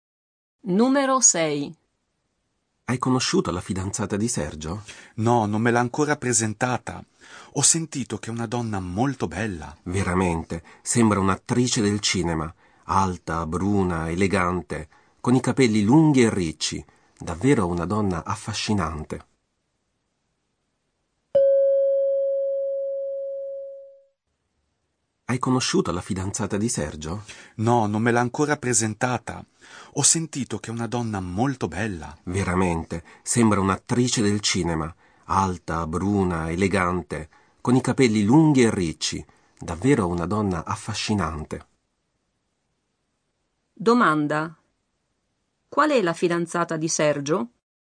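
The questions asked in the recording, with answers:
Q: Domanda. Qual è la fidanzata di Sergio?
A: Una donna alta, bruna, elegante, con i capelli lunghi e ricci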